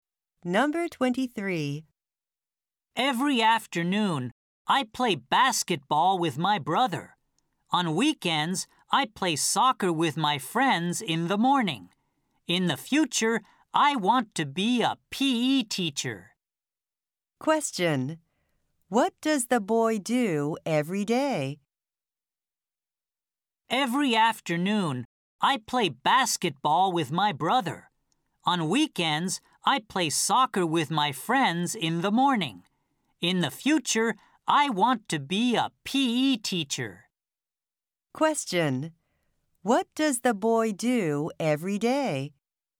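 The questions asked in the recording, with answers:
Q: What does the boy do every day?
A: He plays basketball with his brother every afternoon.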